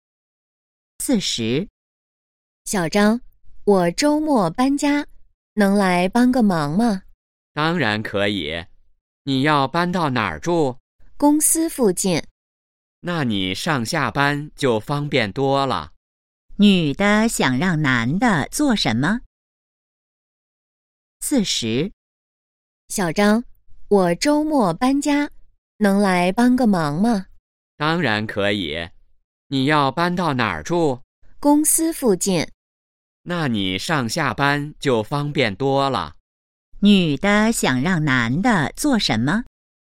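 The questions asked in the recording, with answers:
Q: 女的想让男的做什么?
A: 帮她搬家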